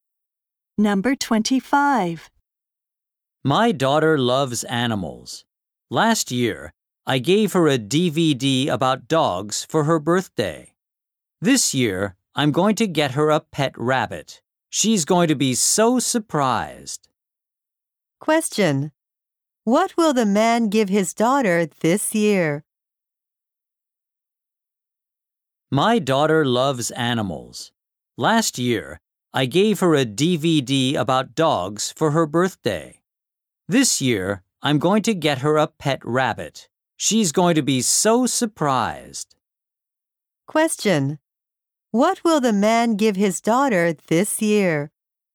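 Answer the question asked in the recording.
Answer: A pet rabbit.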